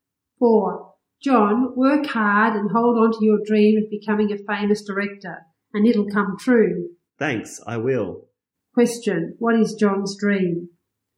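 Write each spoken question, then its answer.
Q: Question, what is John's dream?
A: To become a famous director.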